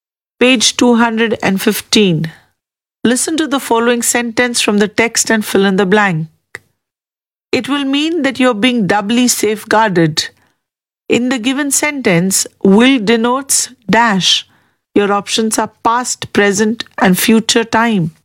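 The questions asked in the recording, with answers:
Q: In the given sentence, will denotes dash.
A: future time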